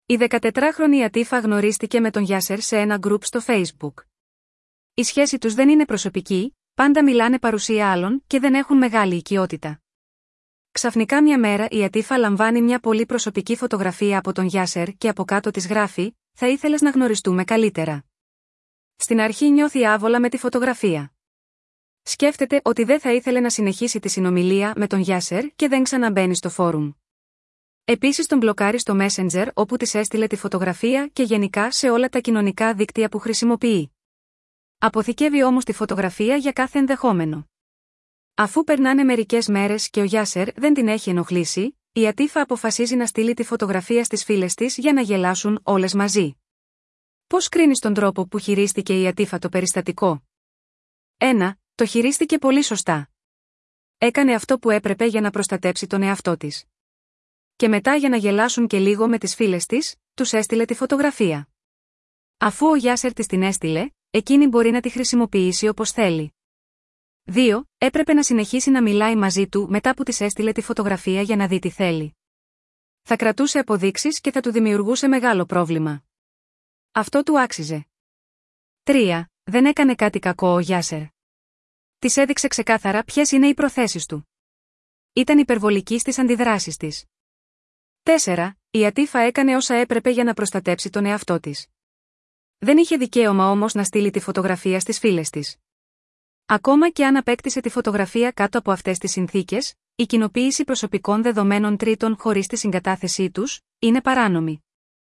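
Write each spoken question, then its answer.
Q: Πώς κρίνεις τον τρόπο που χειρίστηκε η Ατίφα το περιστατικό?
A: 4: Η Ατίφα έκανε όσα έπρεπε για να προστατέψει τον εαυτό της. Δεν είχε δικαίωμα όμως να στείλει τη φωτογραφία στις φίλες της.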